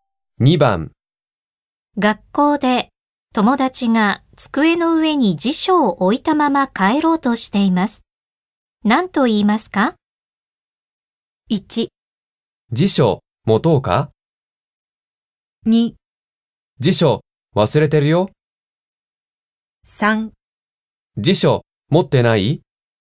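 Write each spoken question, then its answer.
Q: 何と言いますか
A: 2: 辞書忘れてるよ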